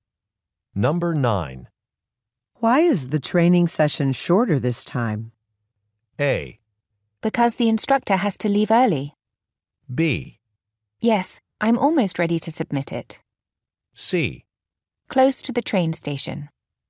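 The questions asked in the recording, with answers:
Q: Why is the training session shorter this time?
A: A: Because the instructor has to leave early.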